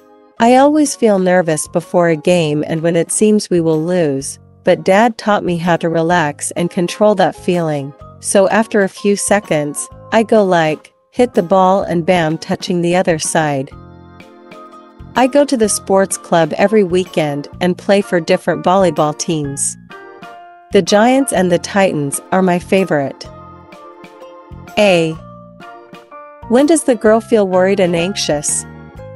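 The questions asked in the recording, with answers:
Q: When does the girl feel worried and anxious?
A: Before a game and when it seems they will lose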